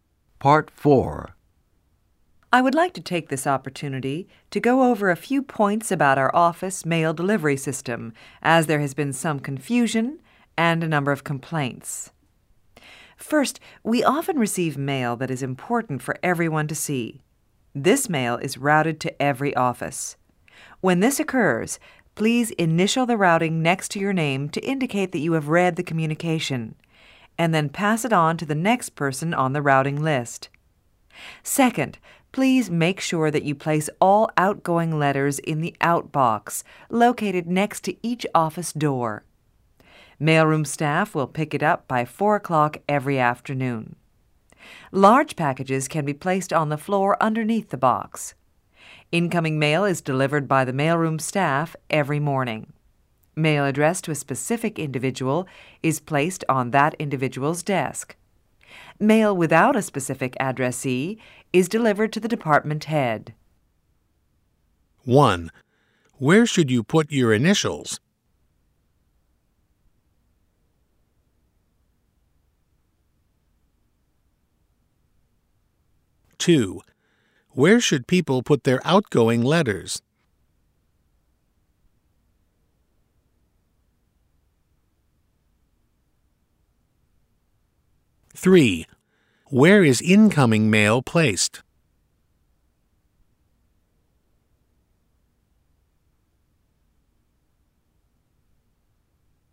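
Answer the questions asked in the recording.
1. On the routing slip next to your name
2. In the outbox next to each office door
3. On the addressee's desk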